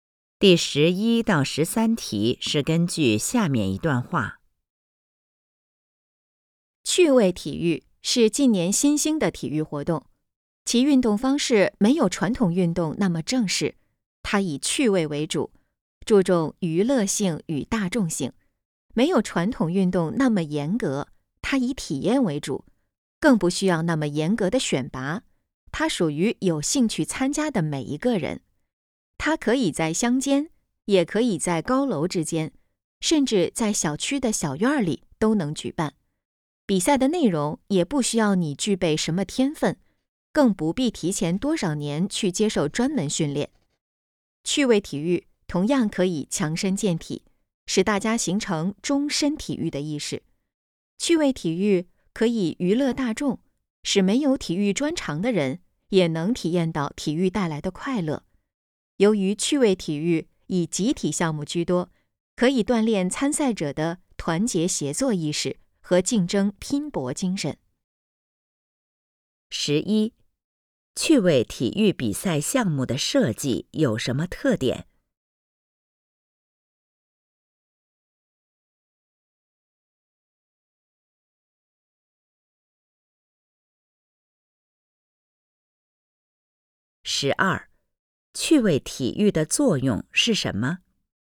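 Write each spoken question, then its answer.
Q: 趣味体育比赛项目的设计有什么特点?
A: 以趣味为主,注重娱乐性与大众性,不需要天分或专门训练

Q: 趣味体育的作用是什么?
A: 强身健体、娱乐大众,锻炼团结协作意识和竞争拼搏精神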